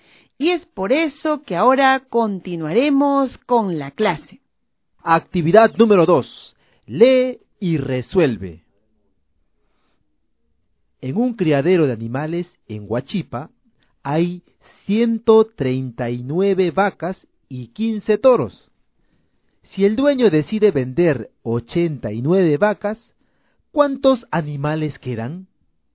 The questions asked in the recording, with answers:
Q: Si el dueño decide vender 89 vacas, ¿cuántos animales quedan?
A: Quedan 65 animales.